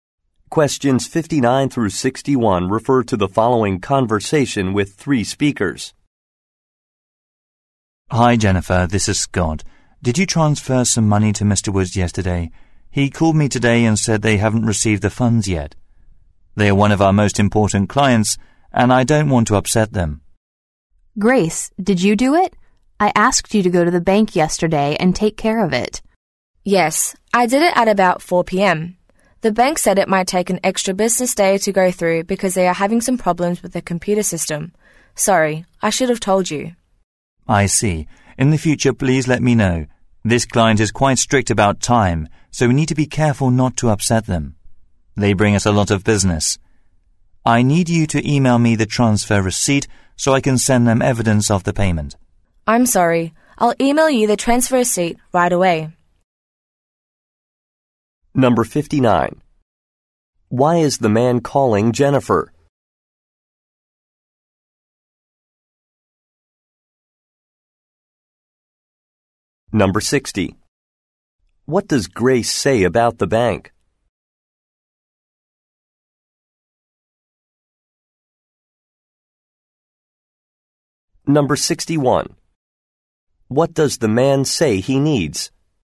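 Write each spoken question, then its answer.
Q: Why is the man calling Jennifer?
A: A client hasn't received a money transfer

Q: What does Grace say about the bank?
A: The transfer may take an extra business day due to computer problems

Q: What does the man say he needs?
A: The transfer receipt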